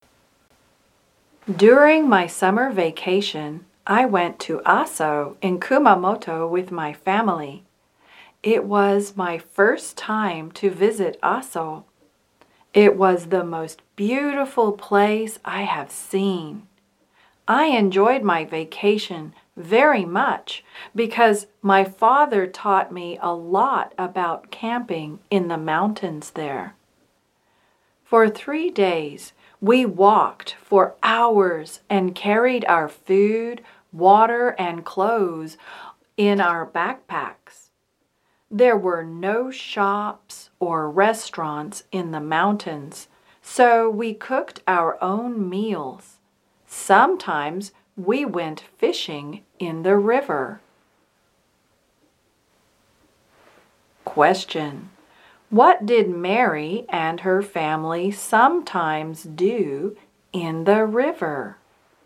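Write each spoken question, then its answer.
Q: What did Mary and her family sometimes do in the river?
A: They went fishing.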